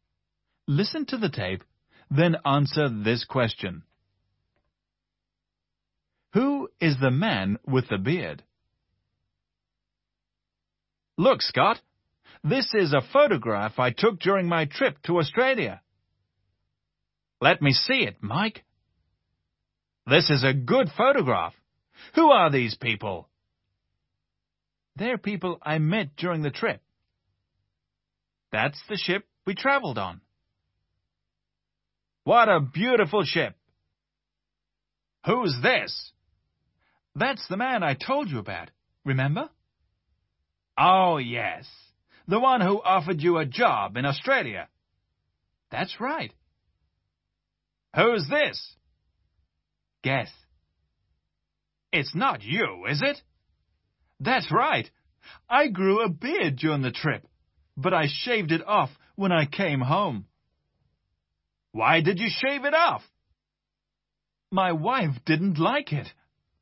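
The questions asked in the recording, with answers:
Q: Who is the man with the beard?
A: Mike (the speaker himself)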